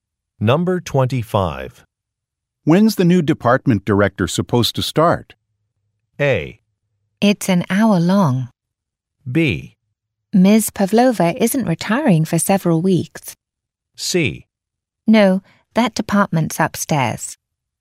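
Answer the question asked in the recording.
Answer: B: Ms. Pavlova isn't retiring for several weeks.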